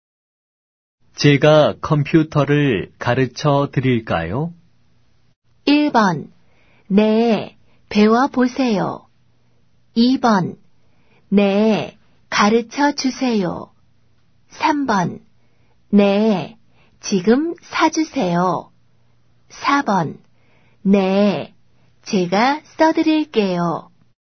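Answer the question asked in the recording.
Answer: 2: 네, 가르쳐 주세요.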